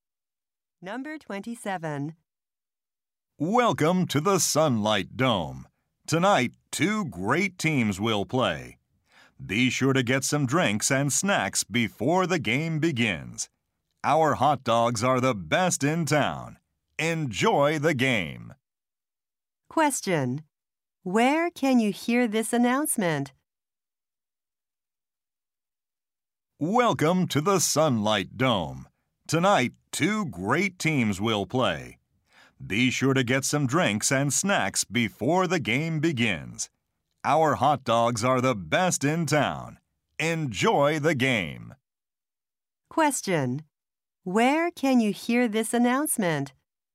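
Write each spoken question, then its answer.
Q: Where can you hear this announcement?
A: At a stadium (the Sunlight Dome).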